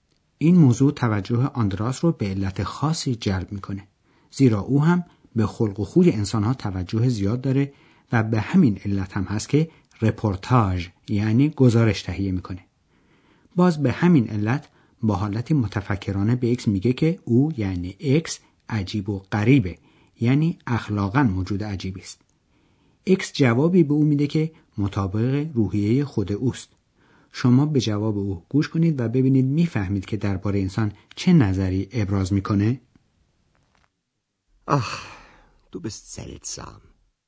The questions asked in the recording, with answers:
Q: شما به جواب او گوش کنید و ببینید میفهمید که درباره انسان چه نظری ابراز میکنه.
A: به نظر اکس انسان ها هم موجودات عجیب و غریبی هستند